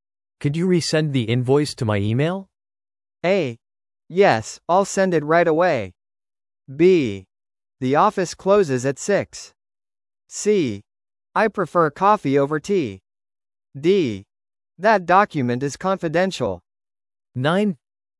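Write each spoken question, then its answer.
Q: Could you resend the invoice to my email?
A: A: Yes, I'll send it right away.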